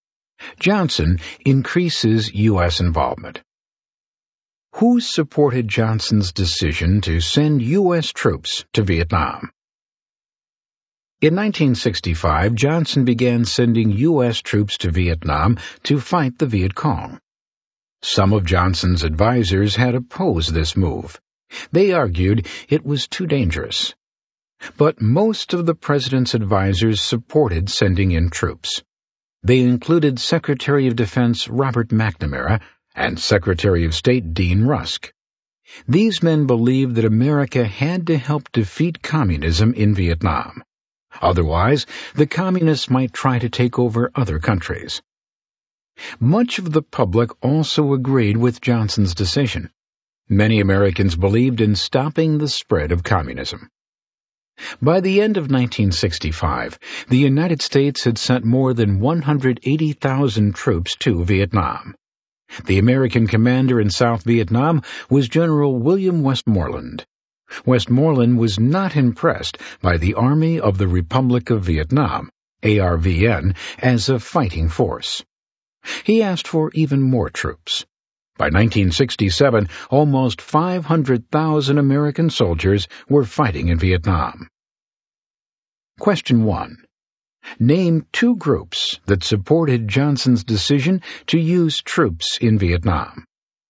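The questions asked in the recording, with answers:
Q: Name two groups that supported Johnson's decision to use troops in Vietnam.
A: Most of his advisors (such as McNamara and Rusk) and much of the American public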